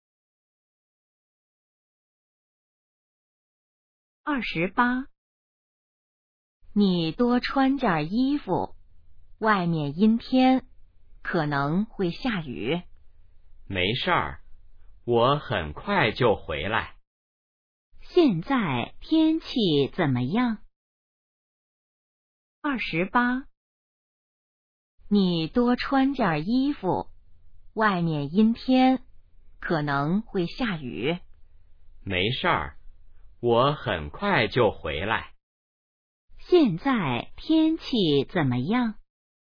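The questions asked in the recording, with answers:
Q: 现在天气怎么样?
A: 阴天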